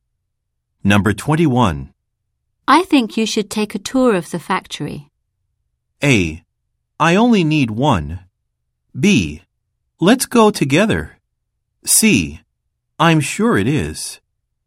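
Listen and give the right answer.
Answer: B: Let's go together.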